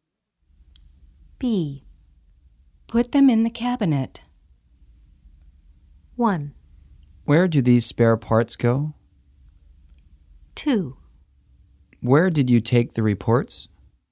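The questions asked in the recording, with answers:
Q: Put them in the cabinet.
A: 1: Where do these spare parts go?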